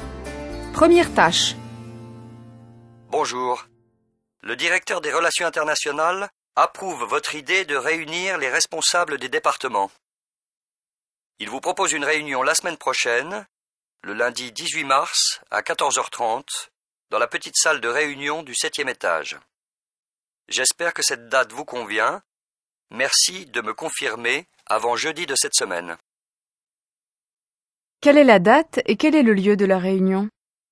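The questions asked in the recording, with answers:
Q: Quelle est la date et quel est le lieu de la réunion ?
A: Le lundi 18 mars à 14h30, dans la petite salle de réunion du 7e étage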